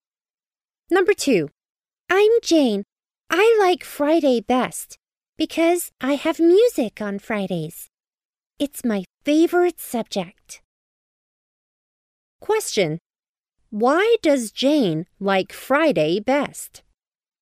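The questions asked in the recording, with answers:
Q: Why does Jane like Friday best?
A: Because she has music on Fridays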